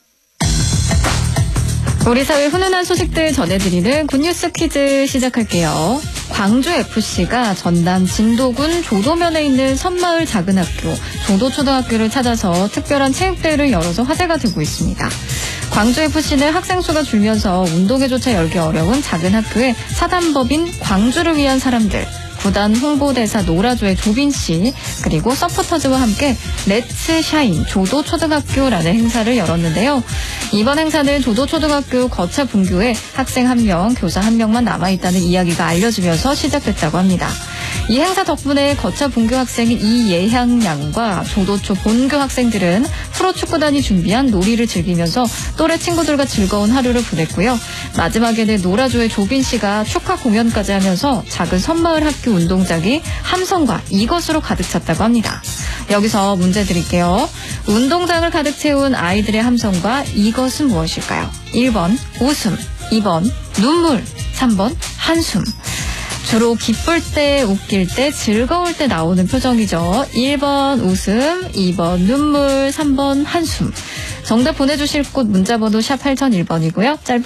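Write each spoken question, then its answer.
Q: 운동장을 가득 채운 아이들의 함성과 이것은 무엇일까요?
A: 1번: 웃음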